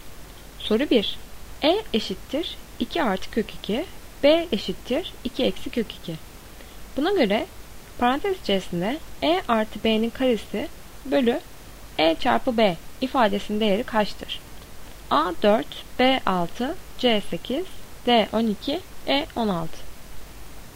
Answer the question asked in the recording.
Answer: Doğru cevap C 8.